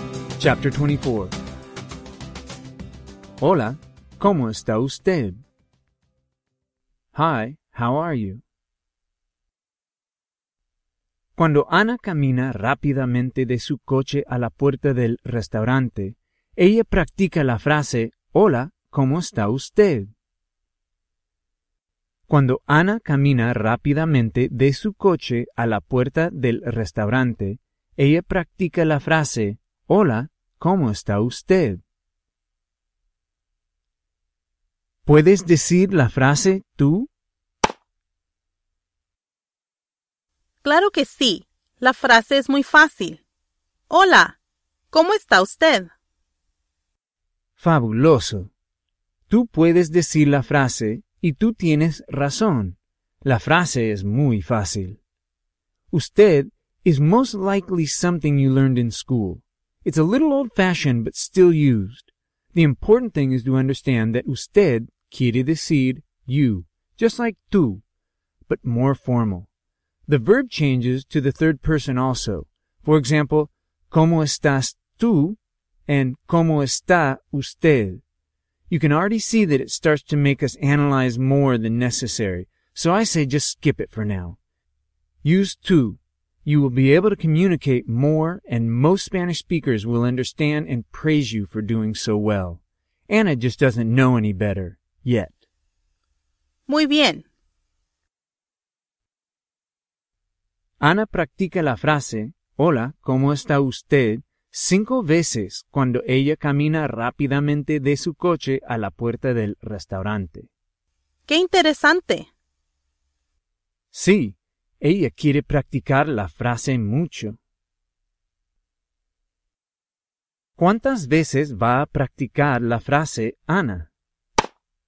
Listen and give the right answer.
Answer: Anna va a practicar la frase, hola, ¿cómo está usted? 5 veces